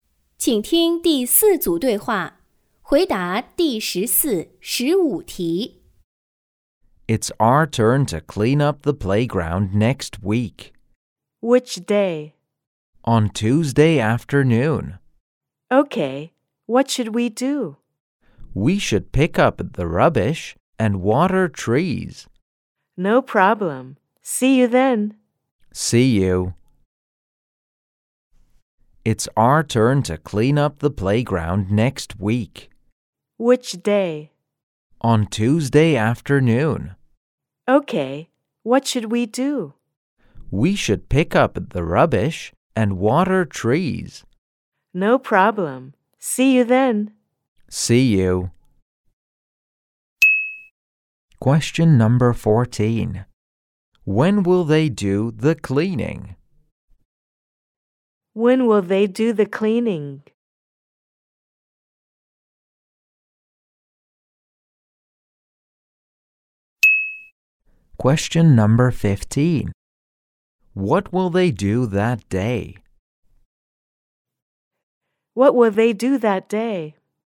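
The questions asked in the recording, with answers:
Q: When will they do the cleaning?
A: On Tuesday afternoon

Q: What will they do that day?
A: Pick up the rubbish and water trees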